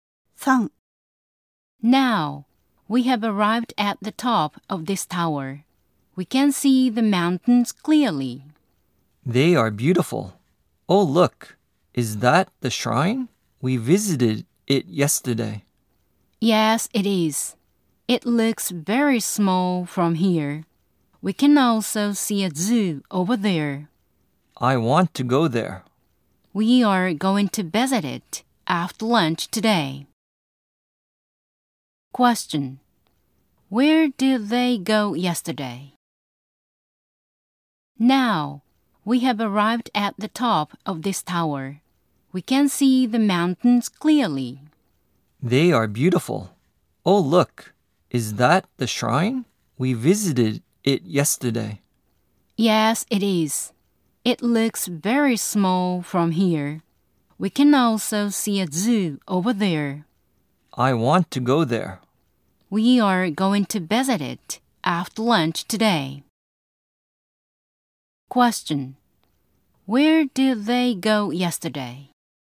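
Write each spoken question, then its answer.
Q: Where did they go yesterday?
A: The shrine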